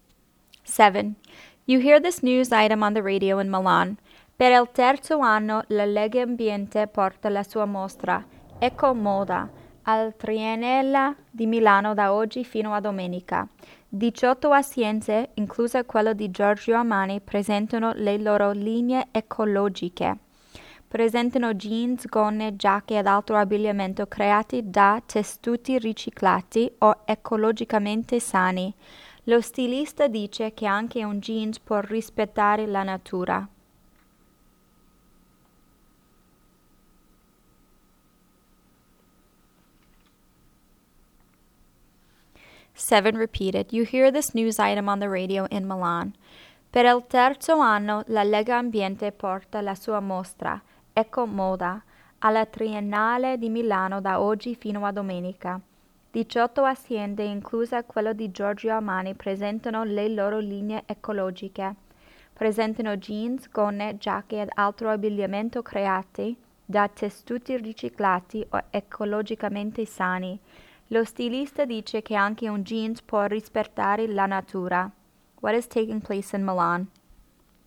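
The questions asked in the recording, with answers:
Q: What is taking place in Milan?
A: An eco-fashion exhibition of clothing made from recycled or ecological fabrics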